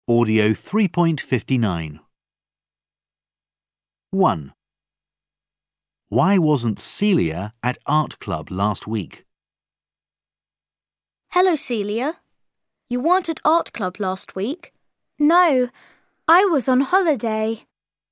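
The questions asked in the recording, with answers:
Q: Why wasn't Celia at art club last week?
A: She was on holiday.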